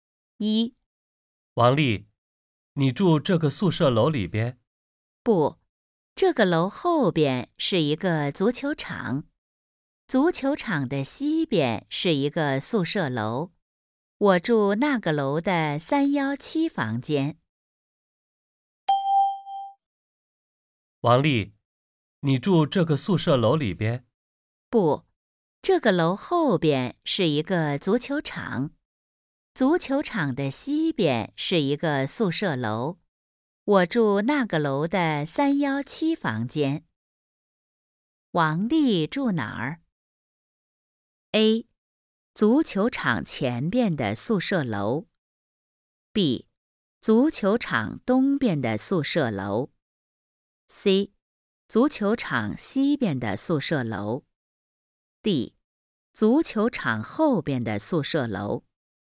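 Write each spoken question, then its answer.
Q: 王丽住哪儿?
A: C: 足球场西边的宿舍楼。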